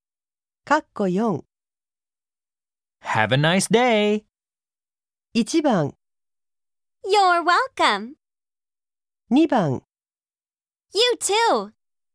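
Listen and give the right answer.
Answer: 2: You too.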